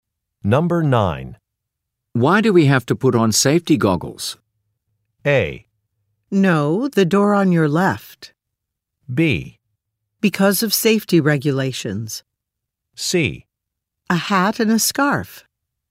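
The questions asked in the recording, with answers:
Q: Why do we have to put on safety goggles?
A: B: Because of safety regulations.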